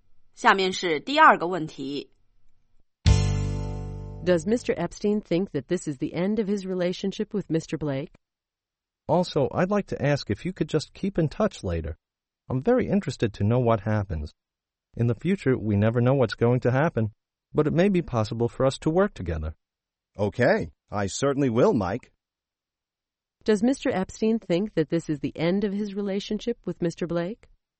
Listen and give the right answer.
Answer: No. He hopes that it will be possible for them to work together in the future.